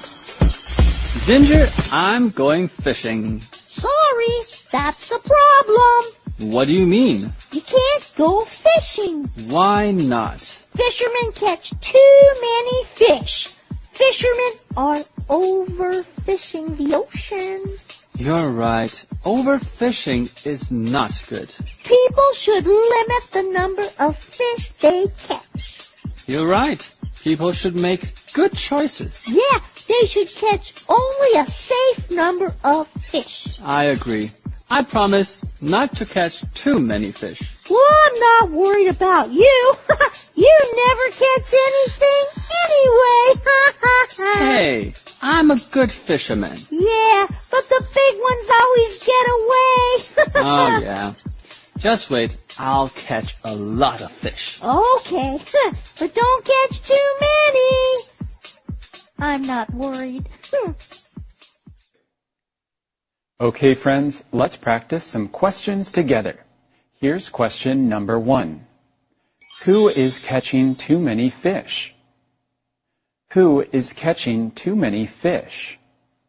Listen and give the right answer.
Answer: Fishermen are catching too many fish.